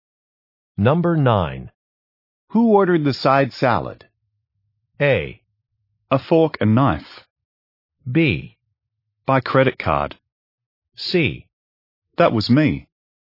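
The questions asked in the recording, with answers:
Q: Who ordered the side salad?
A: C: That was me.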